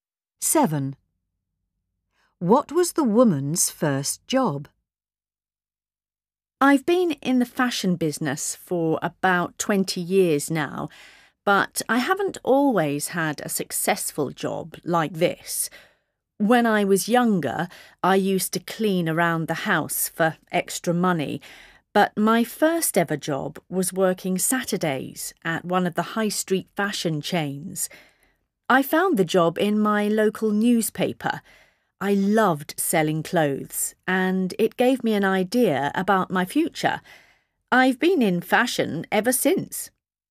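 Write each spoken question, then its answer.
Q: What was the woman's first job?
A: Working Saturdays in a high street fashion shop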